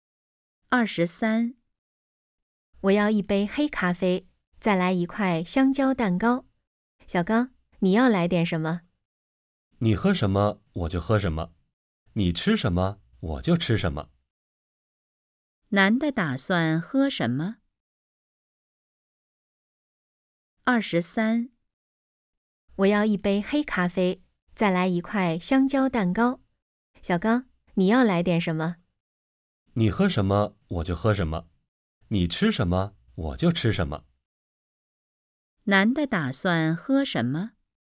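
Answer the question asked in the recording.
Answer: 黑咖啡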